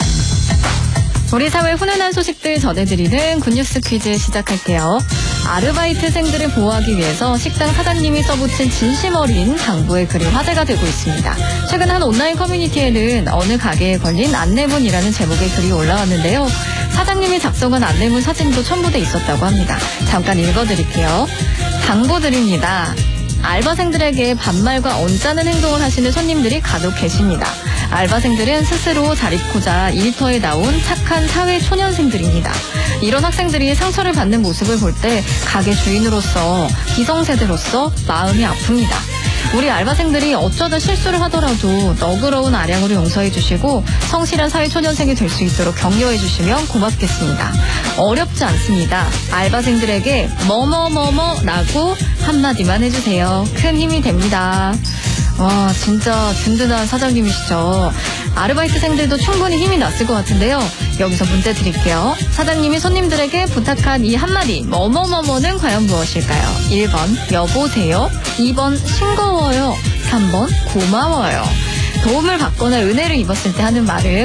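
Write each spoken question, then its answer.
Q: 사장님이 손님들에게 부탁한 이 한마디 뭐뭐뭐뭐는 과연 무엇일까요?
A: 3: 고마워요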